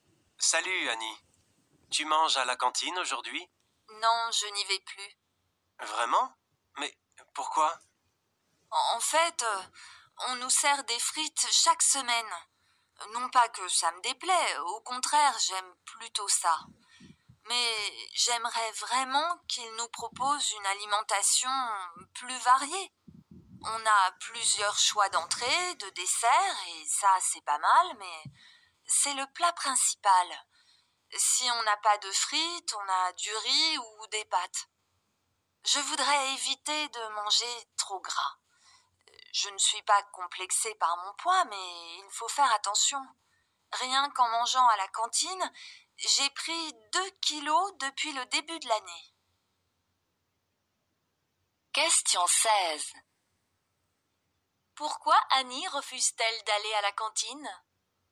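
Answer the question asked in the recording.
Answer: Parce que les repas ne sont pas assez variés (trop de frites, trop gras)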